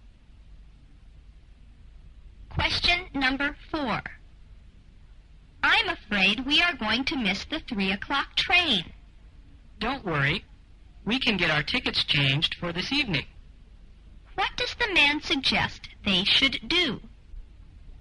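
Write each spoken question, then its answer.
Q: What does the man suggest they should do?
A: Get their tickets changed for an evening train.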